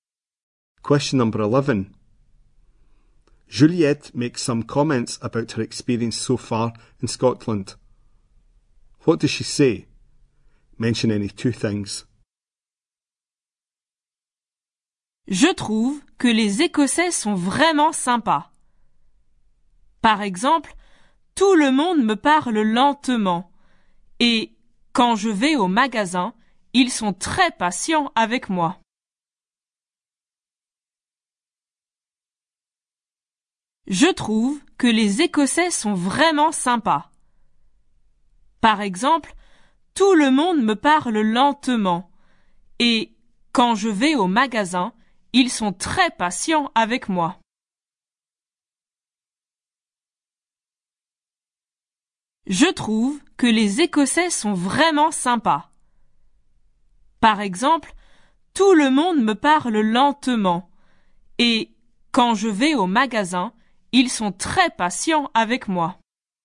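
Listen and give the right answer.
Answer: Scots are really nice; everyone speaks slowly to her; shop staff are very patient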